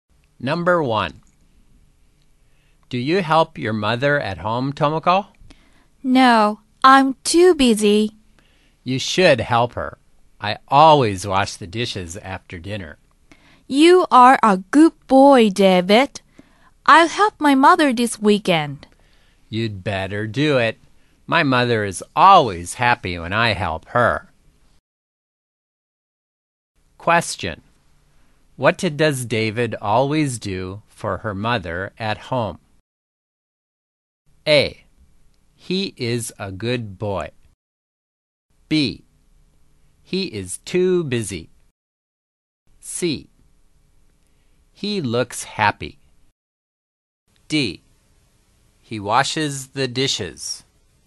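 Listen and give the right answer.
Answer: D: He washes the dishes.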